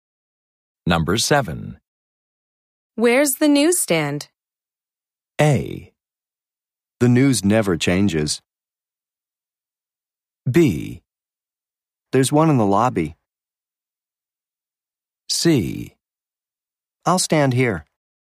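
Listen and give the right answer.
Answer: B: There's one in the lobby.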